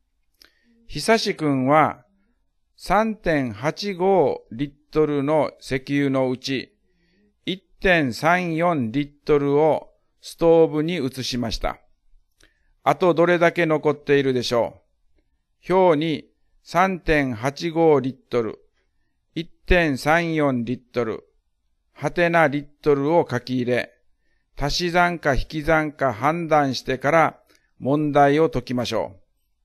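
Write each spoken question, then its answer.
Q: ひさしくんは 3.85リットルの石油のうち 1.34リットルをストーブに移しました。 あとどれだけ残っているでしょう。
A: 2.51リットル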